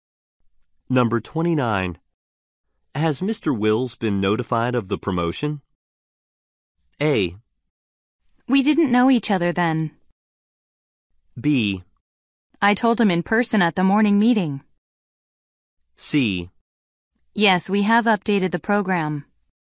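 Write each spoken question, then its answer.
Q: Has Mr. Wills been notified of the promotion?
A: B: I told him in person at the morning meeting.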